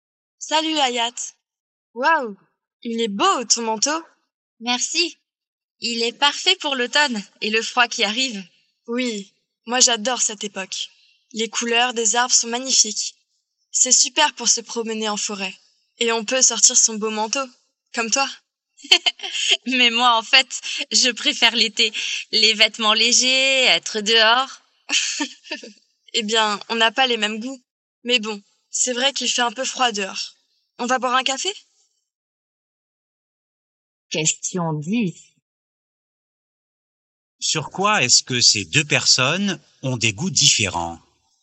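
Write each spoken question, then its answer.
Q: Sur quoi est-ce que ces deux personnes ont des goûts différents?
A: Les saisons (automne ou été)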